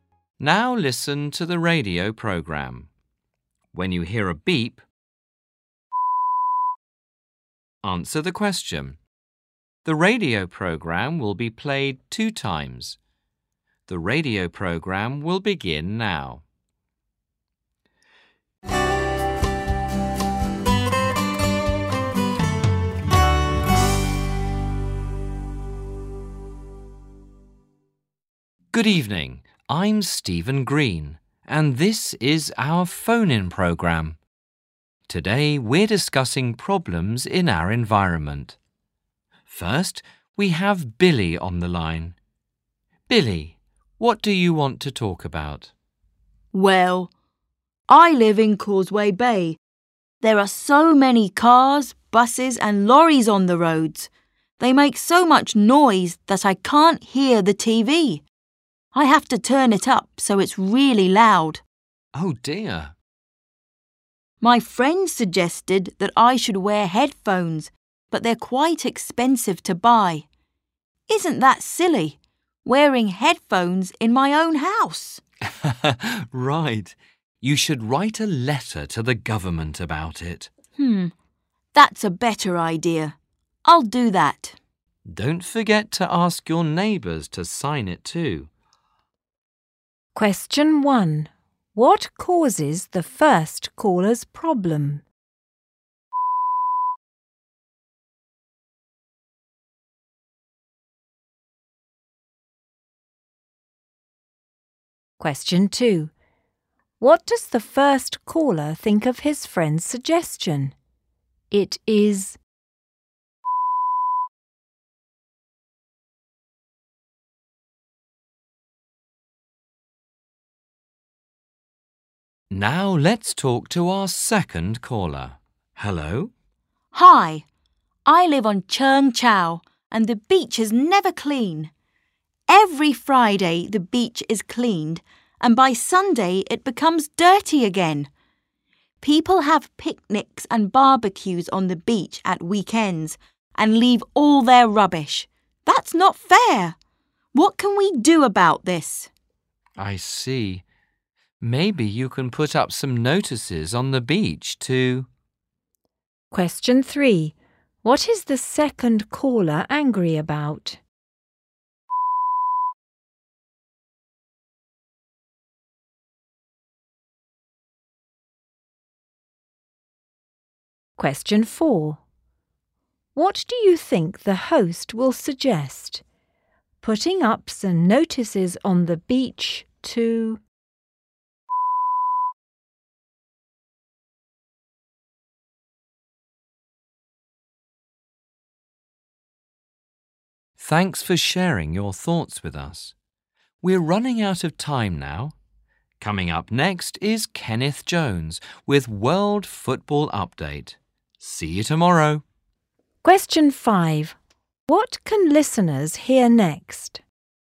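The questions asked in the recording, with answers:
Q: What causes the first caller's problem?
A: Noise from the traffic (cars, buses and lorries)

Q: What does the first caller think of his friend's suggestion?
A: It is silly

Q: What is the second caller angry about?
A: People leave rubbish on the beach, so it is never clean

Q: What can listeners hear next?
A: World Football Update with Kenneth Jones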